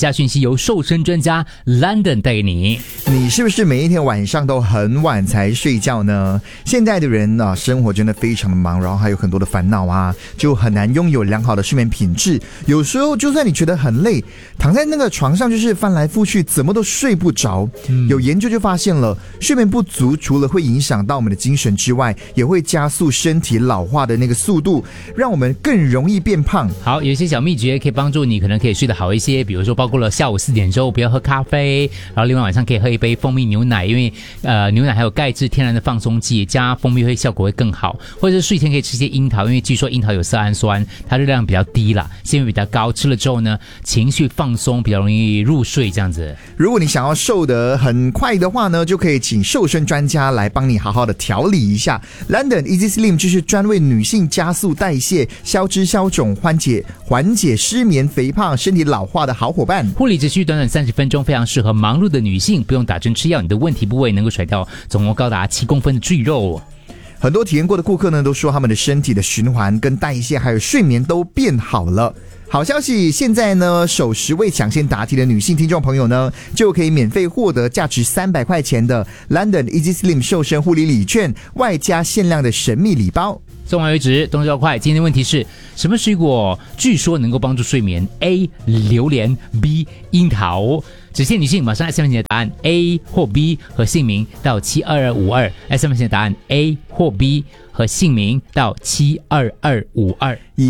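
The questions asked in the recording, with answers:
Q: 今天的问题是什么水果据说能够帮助睡眠?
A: B: 樱桃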